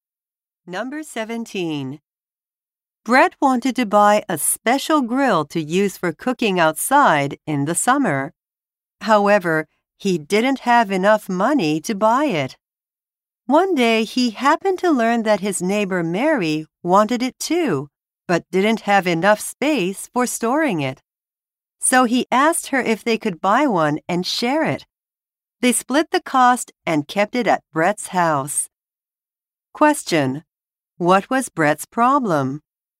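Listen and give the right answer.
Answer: He didn't have enough money to buy the grill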